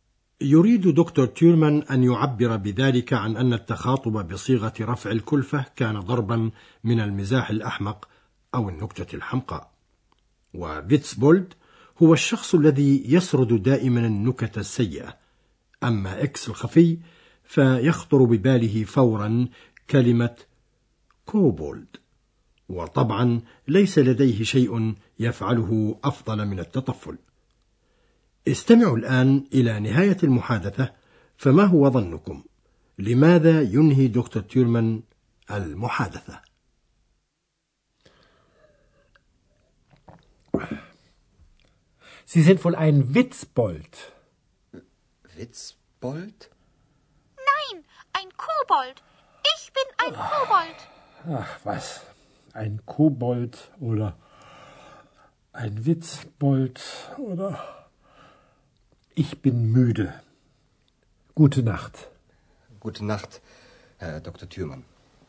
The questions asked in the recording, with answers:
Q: لماذا ينهي دكتور تيرمان المحادثة؟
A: وينهي دكتور تيورمان المحادثة الآن لأنه تعب ميدة